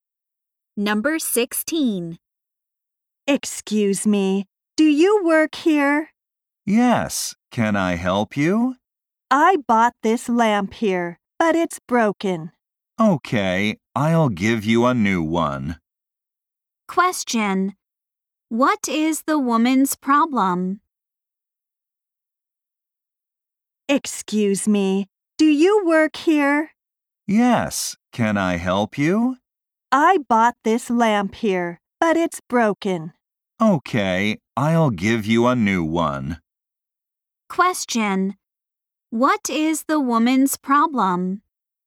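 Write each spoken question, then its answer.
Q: What is the woman's problem?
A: The lamp she bought is broken.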